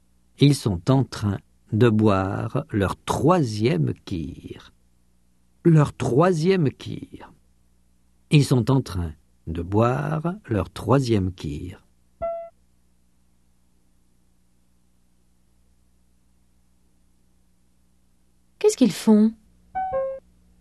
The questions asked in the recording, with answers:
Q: Qu'est-ce qu'ils font?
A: Ils sont en train de boire leur troisième kir.